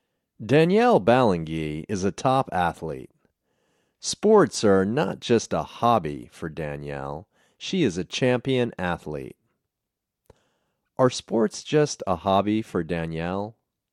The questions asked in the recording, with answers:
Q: Are sports just a hobby for Danielle?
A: No, sports aren't just a hobby.